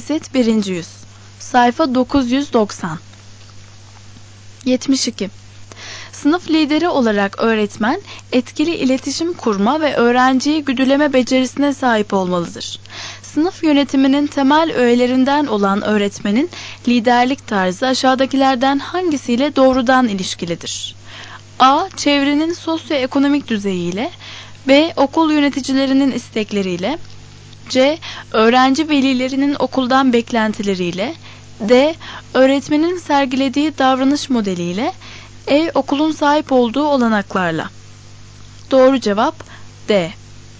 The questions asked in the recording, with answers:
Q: Sınıf yönetiminin temel öğelerinden olan öğretmenin liderlik tarzı aşağıdakilerden hangisiyle doğrudan ilişkilidir?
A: Doğru cevap D.